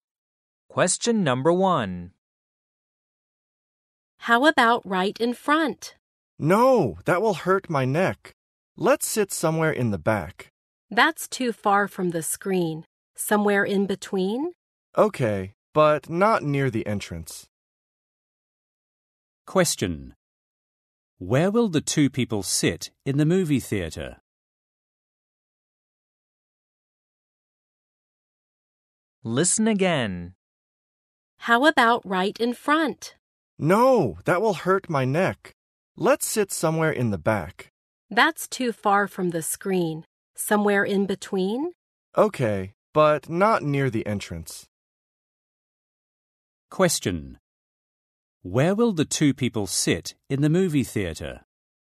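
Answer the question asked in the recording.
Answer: Somewhere in the middle, not near the entrance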